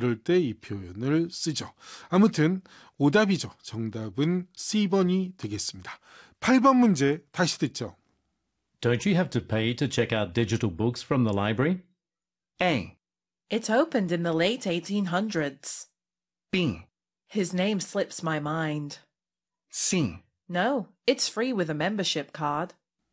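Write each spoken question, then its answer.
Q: Don't you have to pay to check out digital books from the library?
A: C: No, it's free with a membership card.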